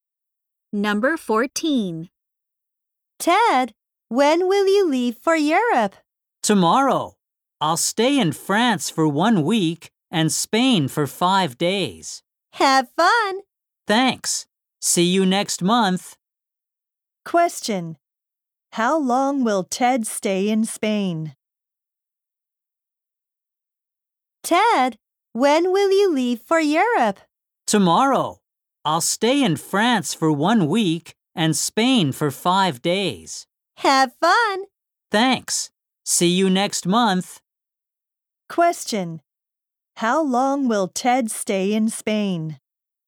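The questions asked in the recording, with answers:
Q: How long will Ted stay in Spain?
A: For 5 days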